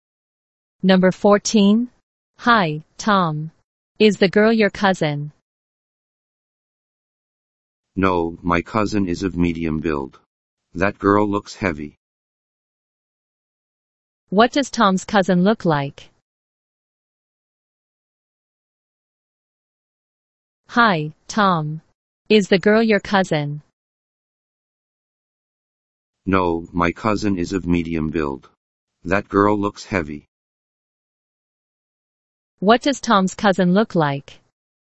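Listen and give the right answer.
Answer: She is of medium build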